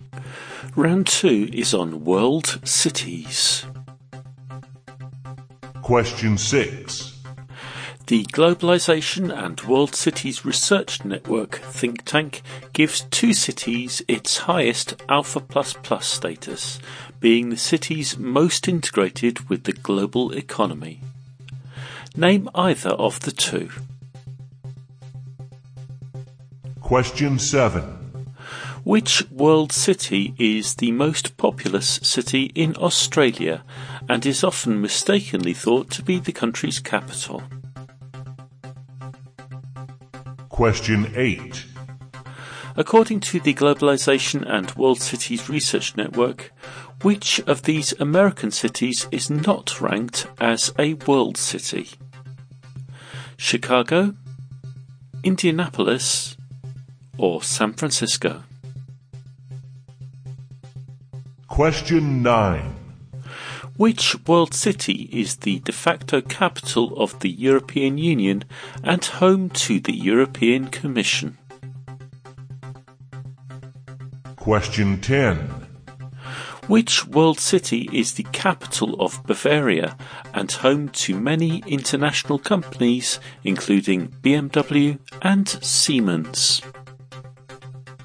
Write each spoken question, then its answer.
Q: According to the Globalization and World Cities Research Network, which of these American cities is not ranked as a world city?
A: Number eight, of the American cities I listed, Indianapolis is not ranked as a world city.